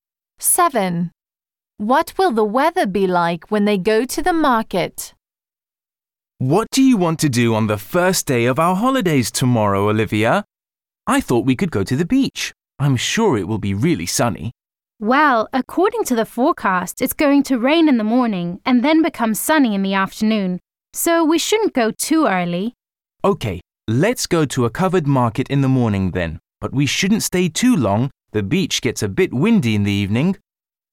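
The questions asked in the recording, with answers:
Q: What will the weather be like when they go to the market?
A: Rainy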